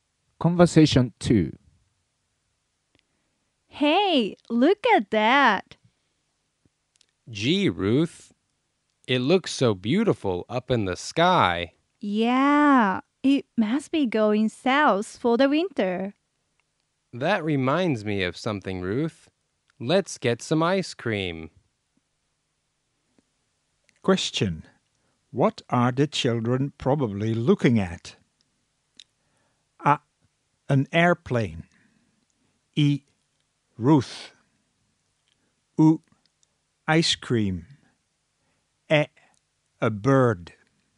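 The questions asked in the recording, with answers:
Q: What are the children probably looking at?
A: え: A bird.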